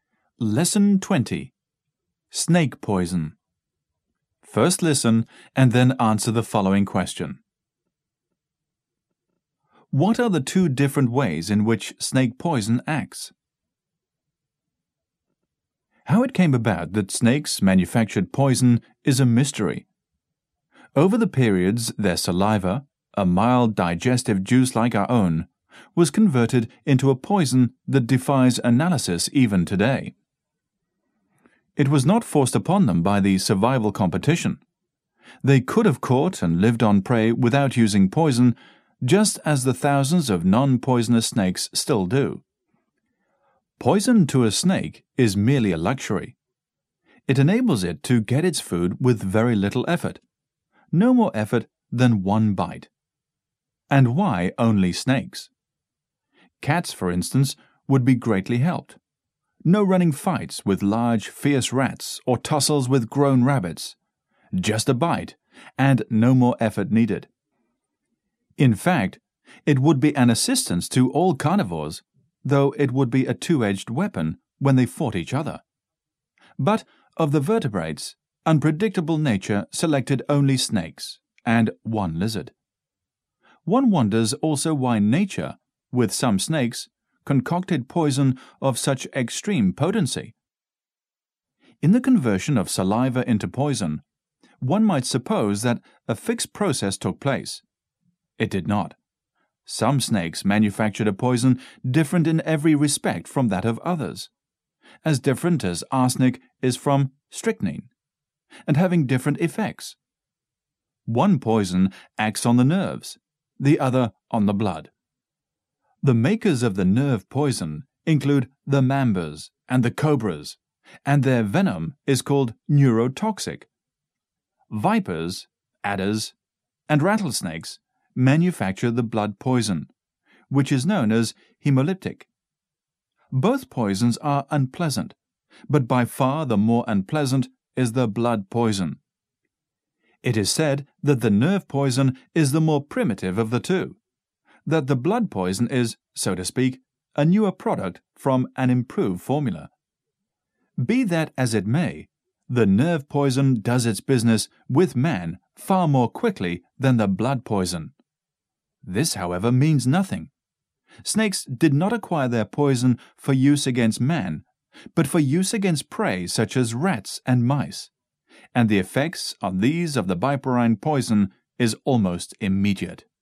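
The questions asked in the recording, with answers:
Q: What are the two different ways in which snake poison acts?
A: One poison acts on the nerves (neurotoxic), the other on the blood (hemolytic).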